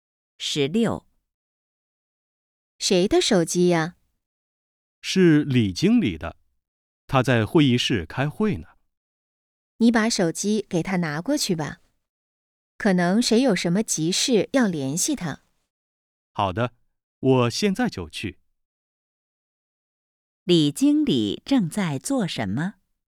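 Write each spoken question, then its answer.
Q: 李经理正在做什么?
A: 在会议室开会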